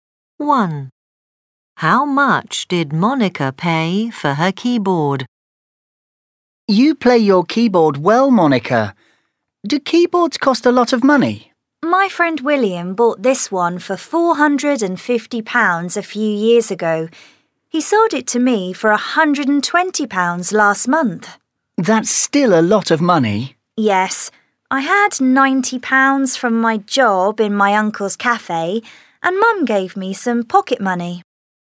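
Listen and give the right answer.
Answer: £120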